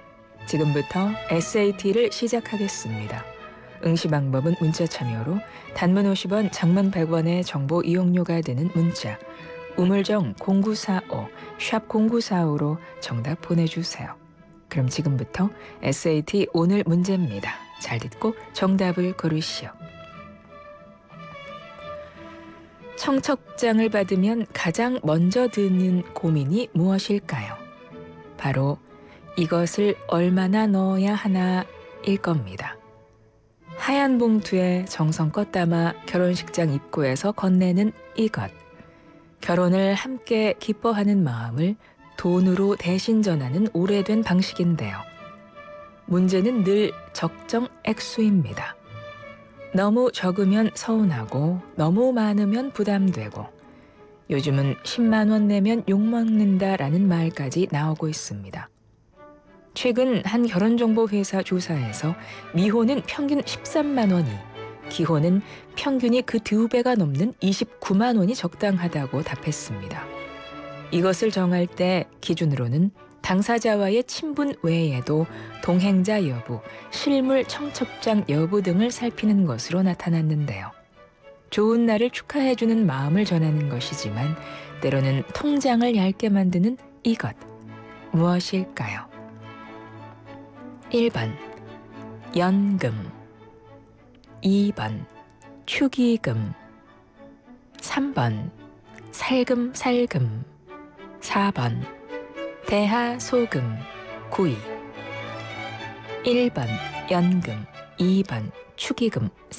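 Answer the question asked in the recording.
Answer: 2: 축의금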